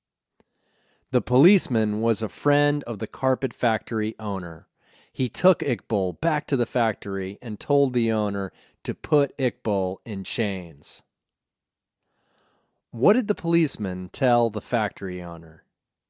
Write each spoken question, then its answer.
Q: What did the policeman tell the factory owner?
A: He told the factory owner to put Iqbal in chains.